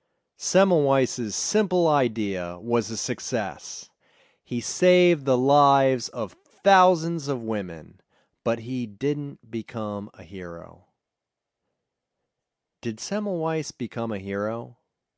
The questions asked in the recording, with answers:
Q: Did Semmelweis become a hero?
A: No, he didn't become a hero.